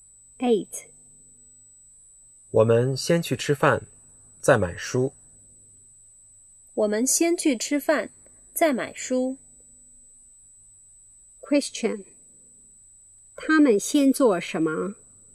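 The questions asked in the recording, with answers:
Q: 他们先做什么?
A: 吃饭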